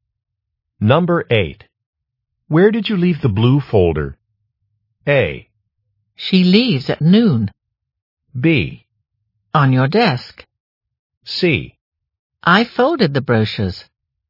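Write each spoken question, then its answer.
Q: Where did you leave the blue folder?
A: B: On your desk.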